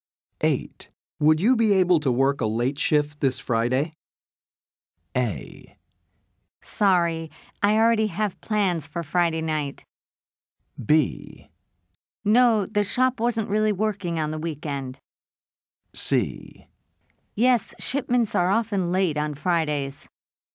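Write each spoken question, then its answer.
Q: Would you be able to work a late shift this Friday?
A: A: Sorry, I already have plans for Friday night.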